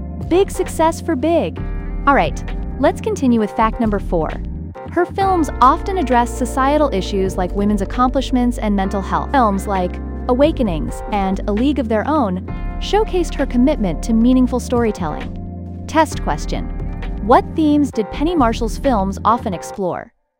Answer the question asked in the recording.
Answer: Correct answer. Societal issues like women's accomplishments and mental health.